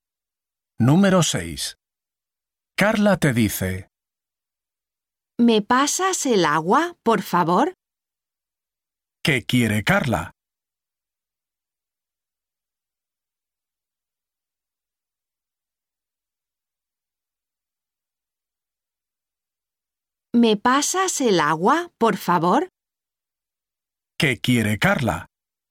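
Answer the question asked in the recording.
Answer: El agua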